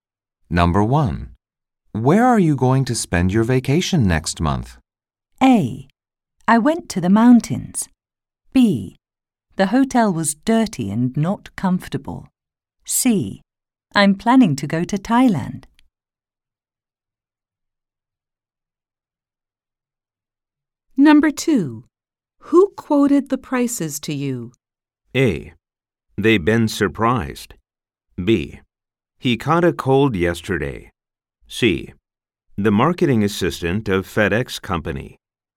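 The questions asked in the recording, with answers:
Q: Where are you going to spend your vacation next month?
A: C: I'm planning to go to Thailand.

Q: Who quoted the prices to you?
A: C: The marketing assistant of FedEx company.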